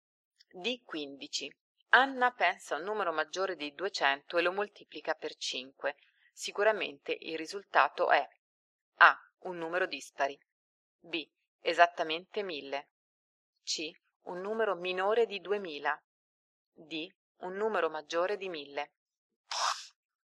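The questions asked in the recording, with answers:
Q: Sicuramente il risultato è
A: D: Un numero maggiore di 1000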